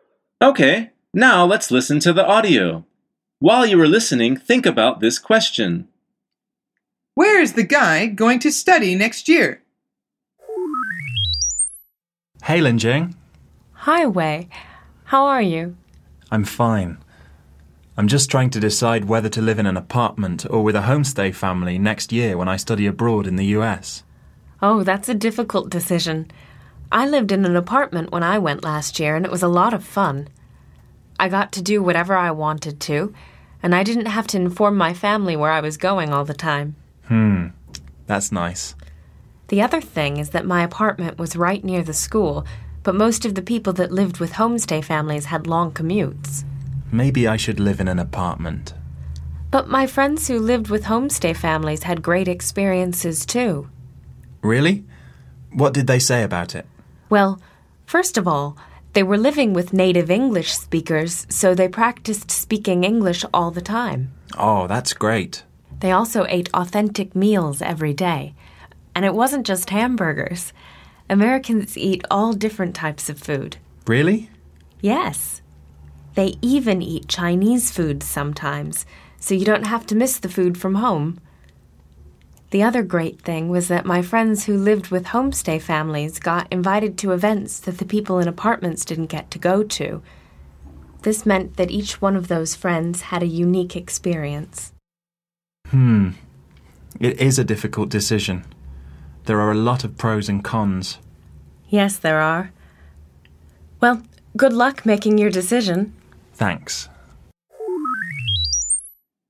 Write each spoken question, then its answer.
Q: Where is the guy going to study next year?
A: The answer is the US.